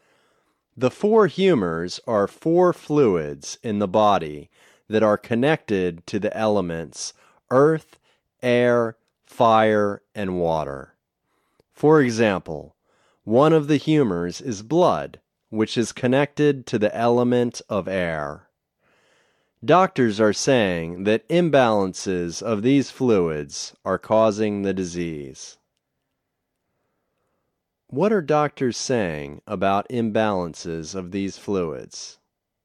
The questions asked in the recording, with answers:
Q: What are doctors saying about imbalances of these fluids?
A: Doctors are saying that imbalances of these fluids are causing the disease.